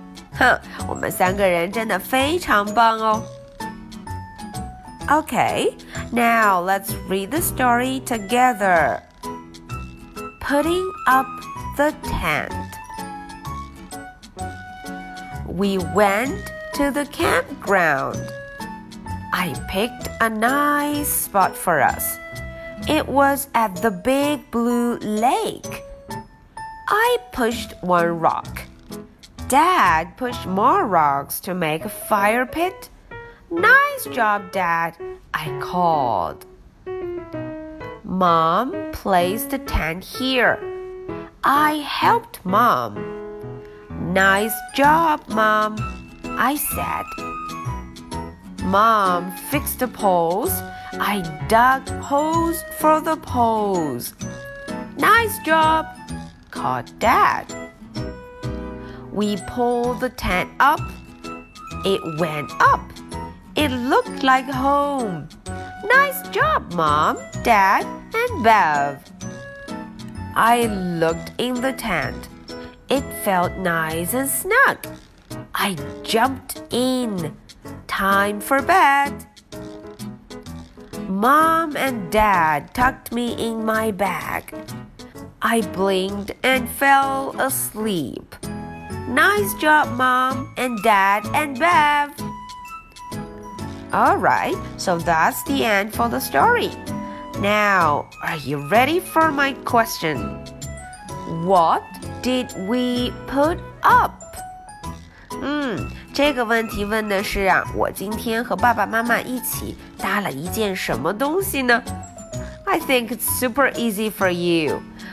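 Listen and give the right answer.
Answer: A tent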